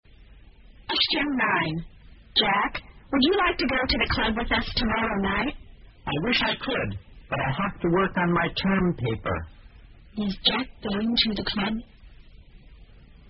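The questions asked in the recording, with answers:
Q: Is Jack going to the club?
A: No, he has to work on his term paper.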